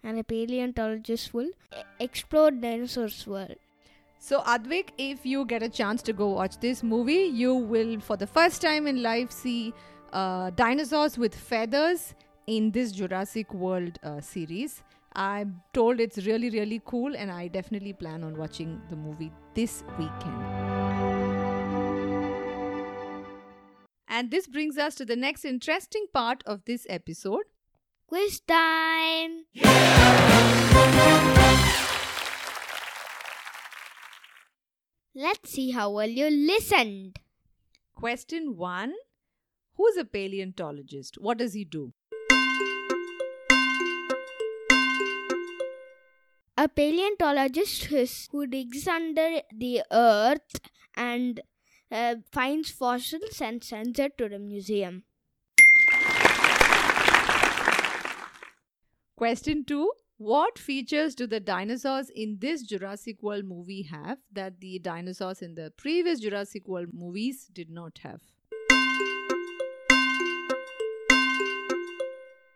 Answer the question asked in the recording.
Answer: The difference is feathers.